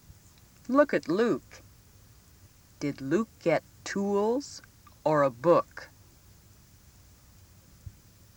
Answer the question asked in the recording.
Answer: You should have circled the tools.